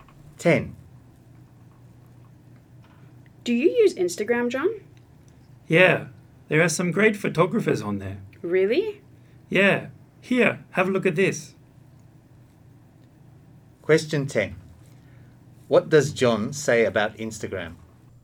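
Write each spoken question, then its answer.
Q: What does John say about Instagram?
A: There are some great photographers on it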